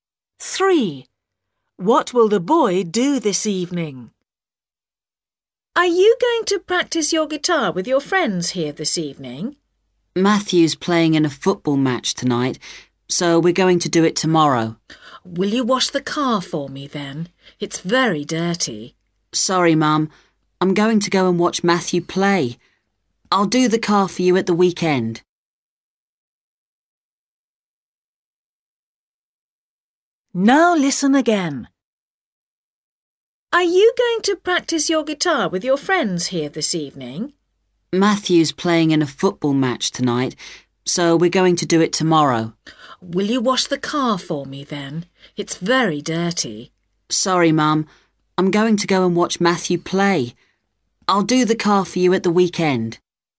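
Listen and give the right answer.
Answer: Watch Matthew play football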